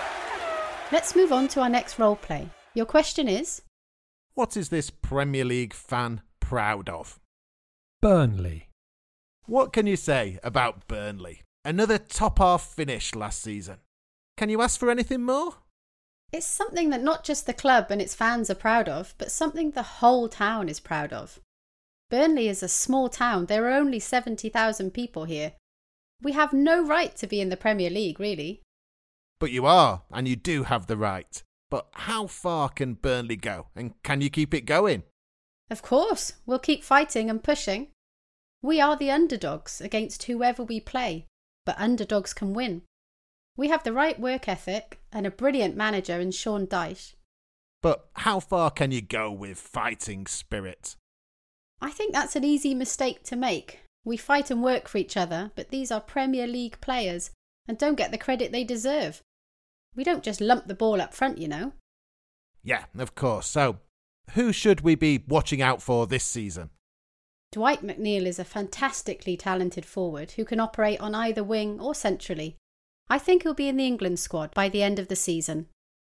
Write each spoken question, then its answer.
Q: What is this Premier League fan proud of?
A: She said she was proud of her club and how a small club and a small town can be battling against other Premier League clubs based in large cities with larger fan bases.